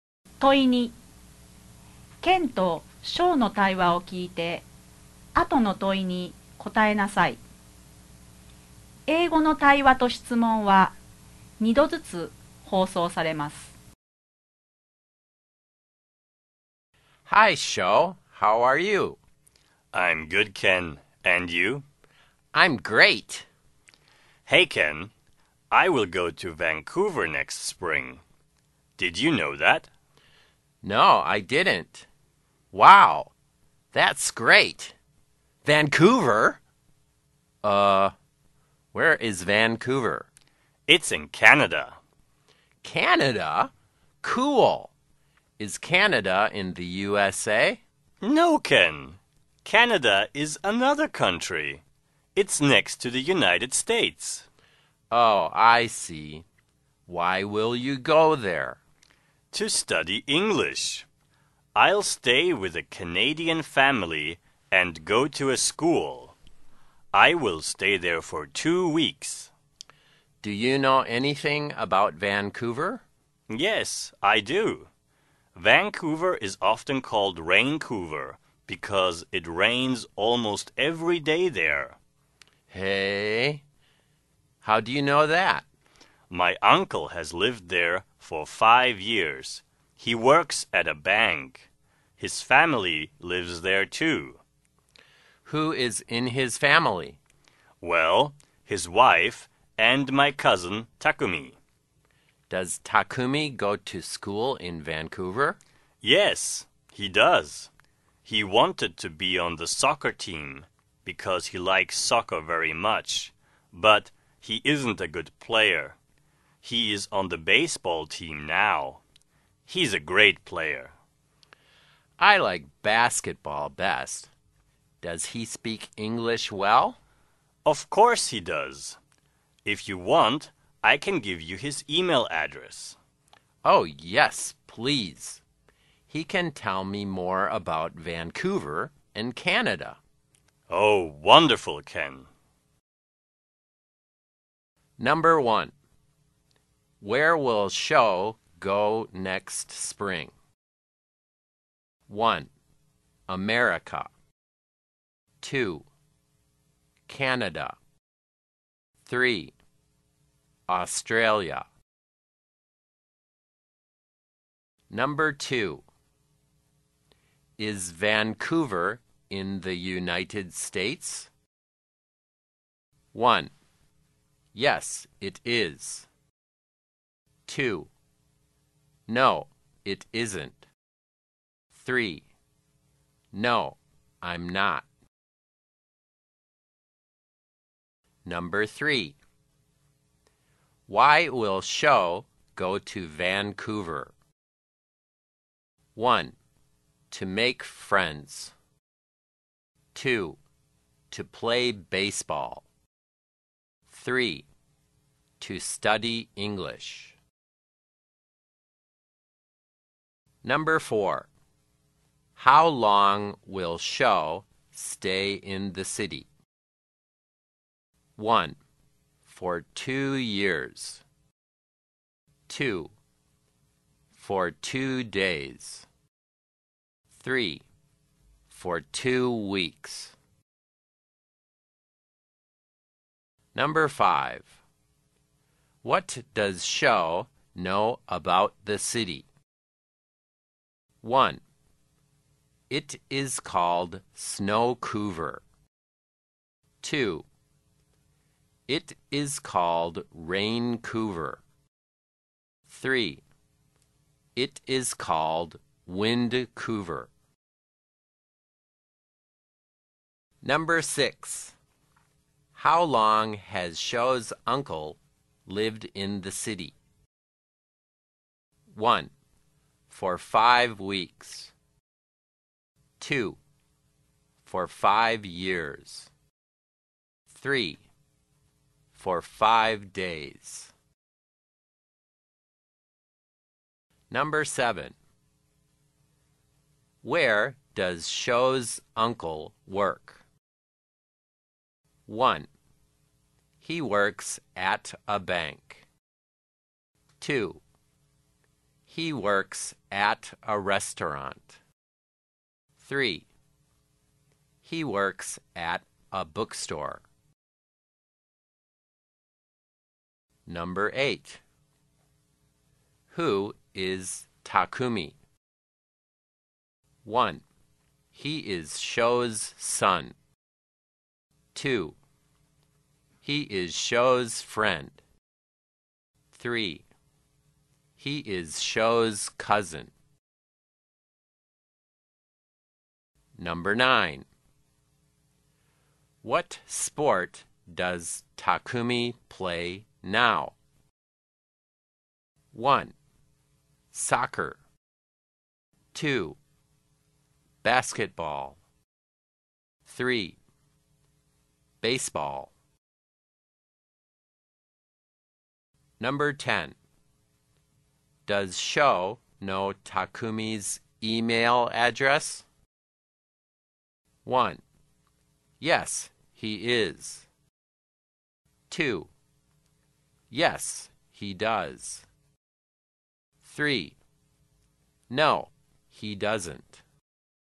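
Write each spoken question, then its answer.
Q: Where will Sho go next spring?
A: 2: Canada

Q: Is Vancouver in the United States?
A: 2: No, it isn't.

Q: Why will Sho go to Vancouver?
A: 3: To study English.

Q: How long will Sho stay in the city?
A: 3: For 2 weeks.

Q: What does Sho know about the city?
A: 2: It is called Raincouver.

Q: How long has Sho's uncle lived in the city?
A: 2: For 5 years.

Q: Where does Sho's uncle work?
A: 1: He works at a bank.

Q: Who is Takumi?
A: 3: He is Sho's cousin.

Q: What sport does Takumi play now?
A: 3: Baseball.

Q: Does Sho know Takumi's email address?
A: 2: Yes, he does.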